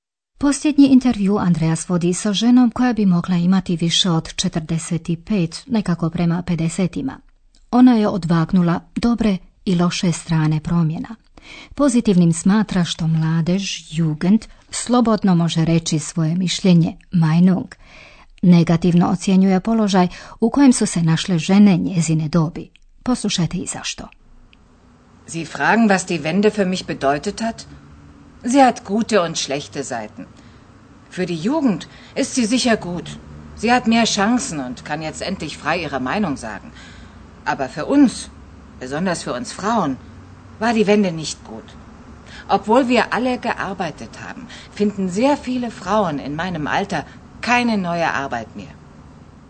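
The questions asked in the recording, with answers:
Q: Poslušajte i zašto.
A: Jer mnoge žene njezine dobi više ne nalaze novi posao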